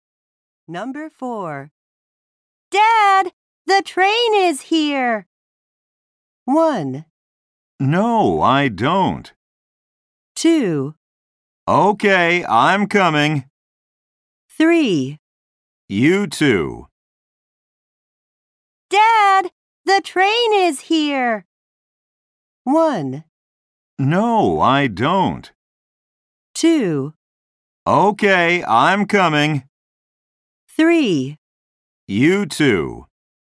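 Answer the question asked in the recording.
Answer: 2: Okay, I'm coming.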